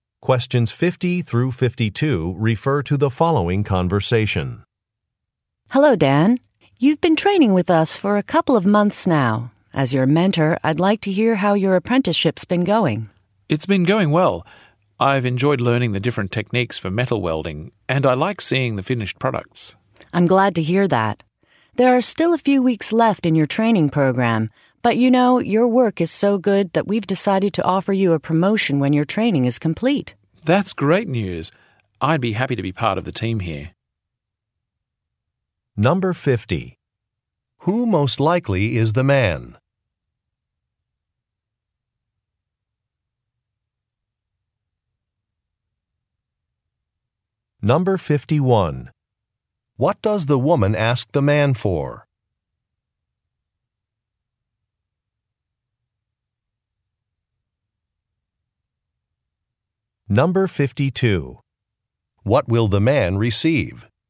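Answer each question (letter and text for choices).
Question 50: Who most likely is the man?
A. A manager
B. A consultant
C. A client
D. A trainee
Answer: D. A trainee

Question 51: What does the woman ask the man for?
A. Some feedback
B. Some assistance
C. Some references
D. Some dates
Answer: A. Some feedback

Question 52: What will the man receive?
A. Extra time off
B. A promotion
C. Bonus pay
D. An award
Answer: B. A promotion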